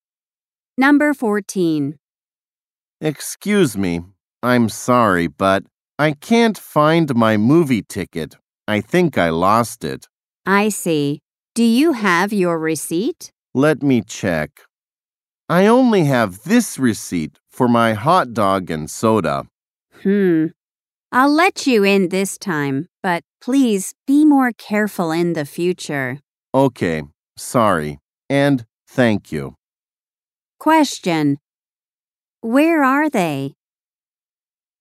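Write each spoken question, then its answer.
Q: Where are they?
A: At a movie theater.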